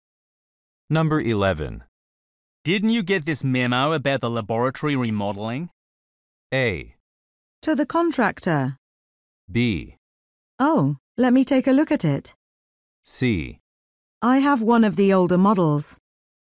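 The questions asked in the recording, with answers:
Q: Didn't you get this memo about the laboratory remodeling?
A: B: Oh, let me take a look at it.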